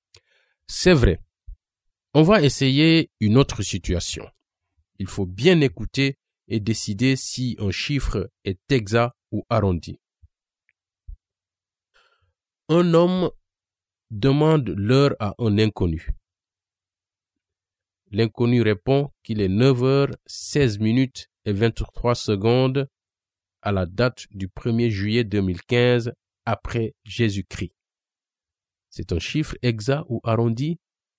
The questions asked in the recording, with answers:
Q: C'est un chiffre exact ou arrondi?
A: Il a l'air très exact.